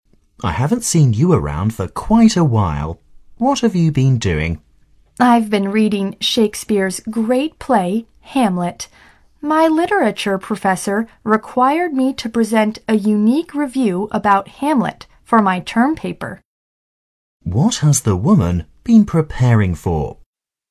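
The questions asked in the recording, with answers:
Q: What has the woman been preparing for?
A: Her term paper, a review of Hamlet.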